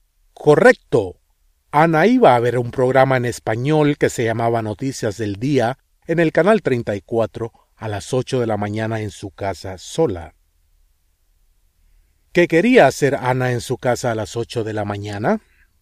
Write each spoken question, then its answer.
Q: ¿Qué quería hacer Ana en su casa a las 8 de la mañana?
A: Ana quería ver la televisión a las 8 de la mañana.